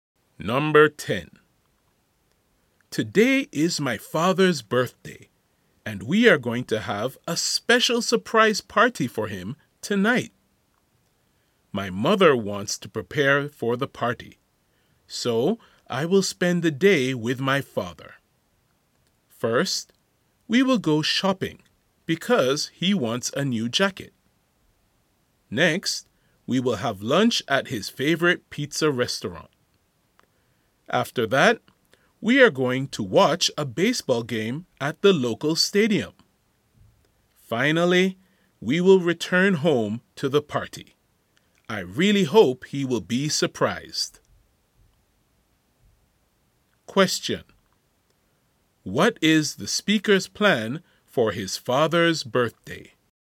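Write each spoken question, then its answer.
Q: What is the speaker's plan for his father's birthday?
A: Spend the day with him (shopping, lunch, a baseball game) before a surprise party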